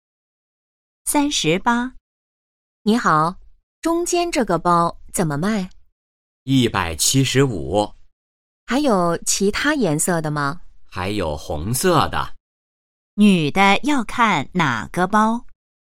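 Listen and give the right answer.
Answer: 中间的那个包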